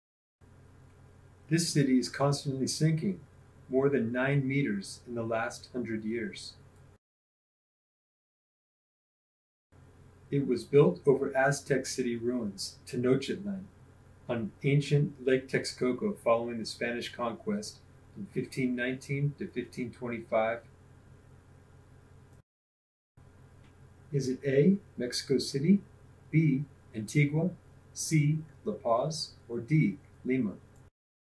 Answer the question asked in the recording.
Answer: If you wrote Mexico City, you're correct.